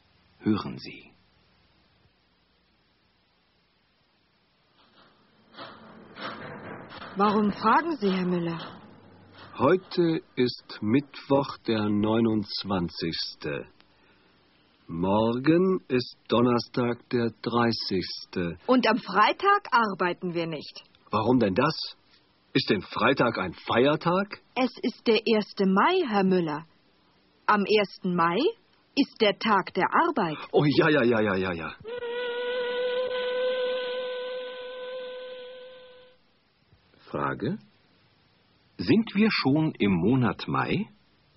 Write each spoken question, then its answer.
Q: Sind wir schon im Monat Mai?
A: Nein, wir sind noch nicht im Monat Mai.